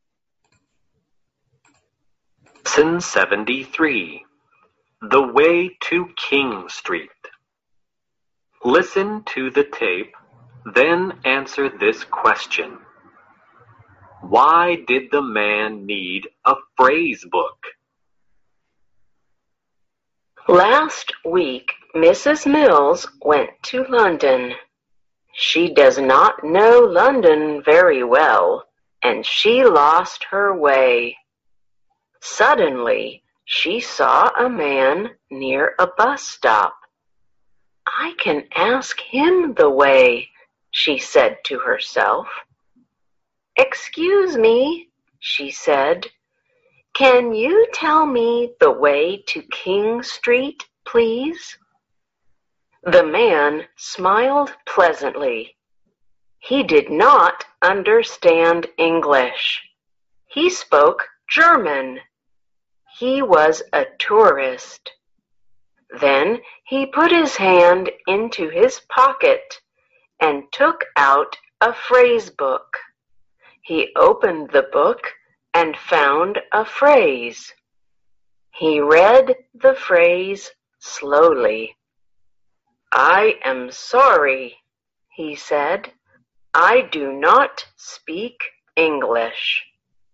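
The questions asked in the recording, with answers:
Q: Why did the man need a phrase book?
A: Because he did not speak English; he was a German tourist.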